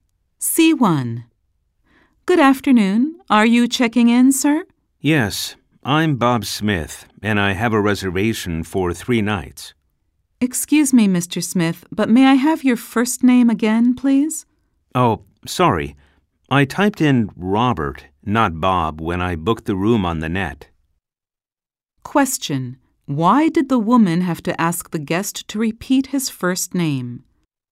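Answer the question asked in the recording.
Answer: He booked the room online under the name Robert, not Bob.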